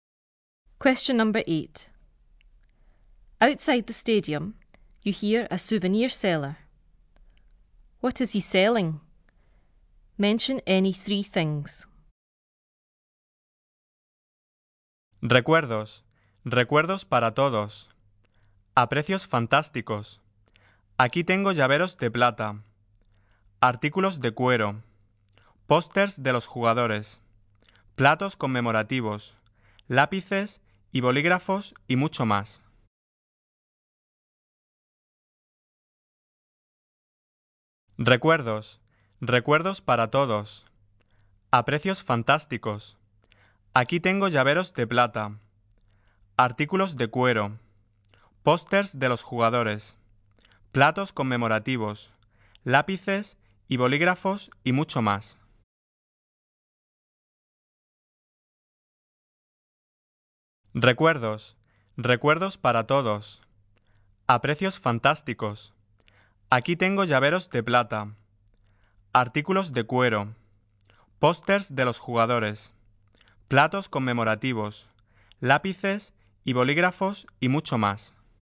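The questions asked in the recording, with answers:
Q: What is he selling? Mention any three things.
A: Silver keyrings, leather goods, posters of the players, commemorative plates, pencils and pens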